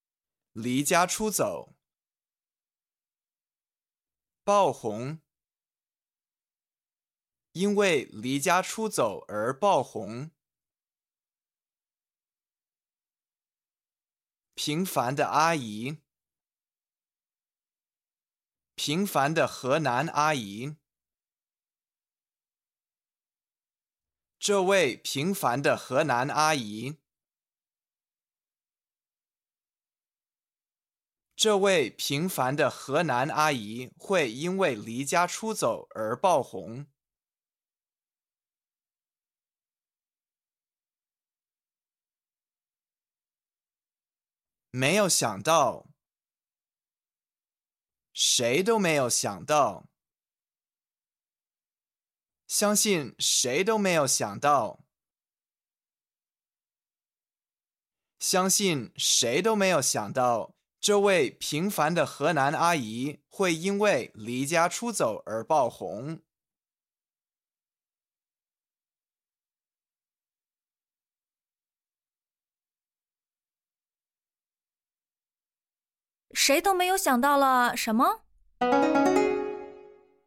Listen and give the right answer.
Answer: 相信谁都没有想到,这位平凡的河南阿姨会因为离家出走而爆红。